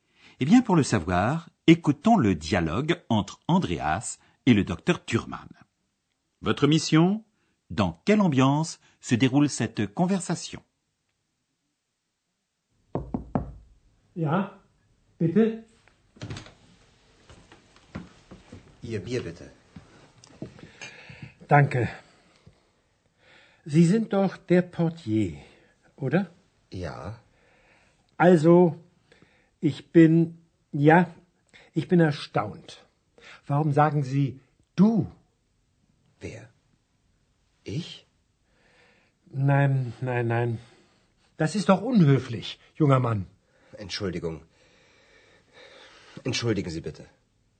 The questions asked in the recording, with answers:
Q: Votre mission Dans quelle ambiance se déroule cette conversation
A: Alors, cette ambiance. Hmm, assez neutre, voire assez peu amicale, non?